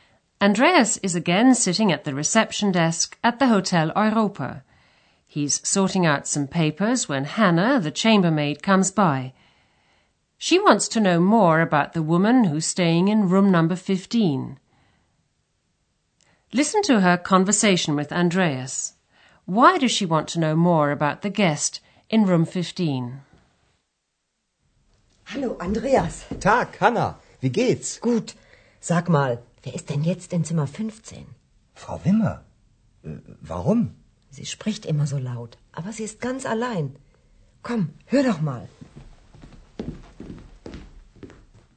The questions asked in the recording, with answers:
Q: Why does she want to know more about the guest in room 15?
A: Hannah wants to know who's in room 15, because she's noticed that the woman always speaks in such a loud voice.